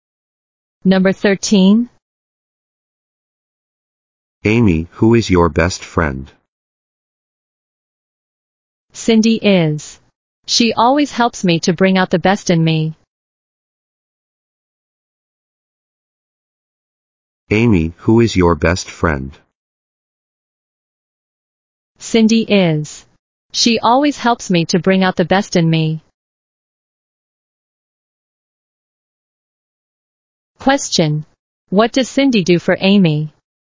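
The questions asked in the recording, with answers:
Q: What does Cindy do for Amy?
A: She helps bring out the best in Amy.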